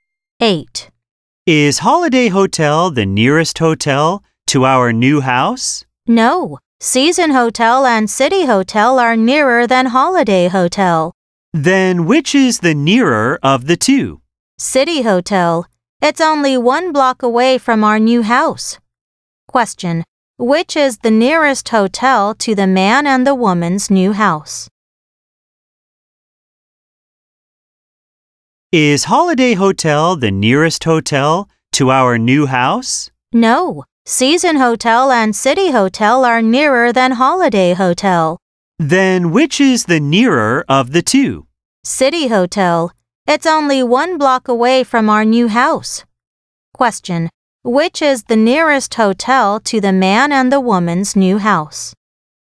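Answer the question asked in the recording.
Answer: City Hotel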